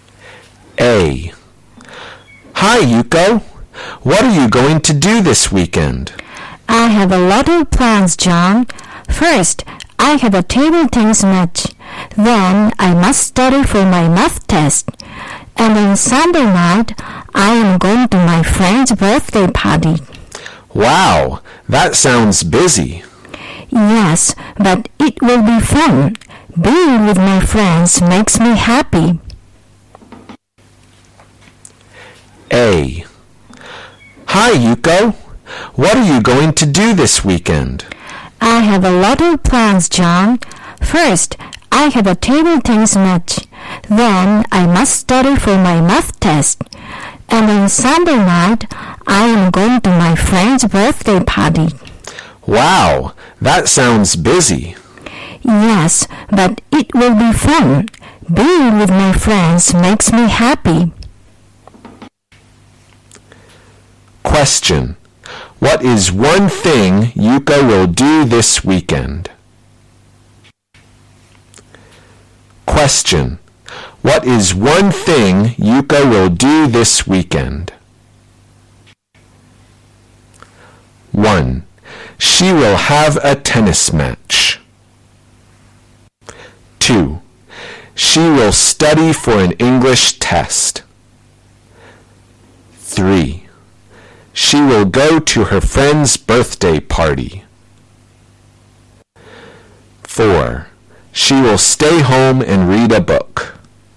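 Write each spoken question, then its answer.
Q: What is one thing Yuko will do this weekend?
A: 3: She will go to her friend's birthday party.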